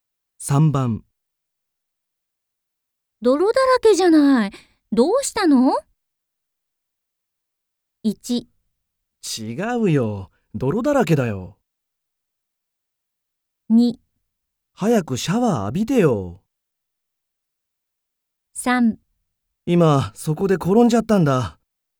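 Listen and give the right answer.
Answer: 3: 今、そこで転んじゃったんだ。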